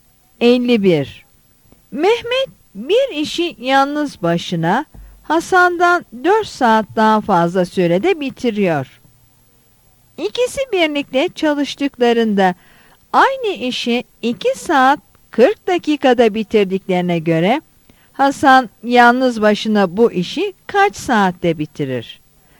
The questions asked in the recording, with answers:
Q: İkisi birlikte çalıştıklarında aynı işi 2 saat 40 dakikada bitirdiklerine göre Hasan yalnız başına bu işi kaç saatte bitirir?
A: Yanıt B'dir.